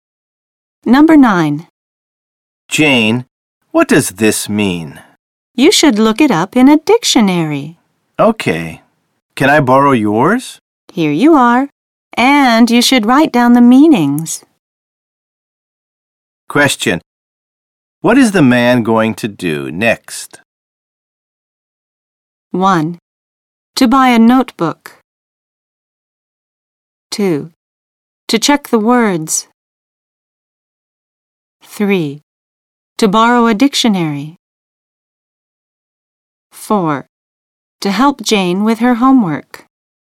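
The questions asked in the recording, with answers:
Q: What is the man going to do next?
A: 2: To check the words.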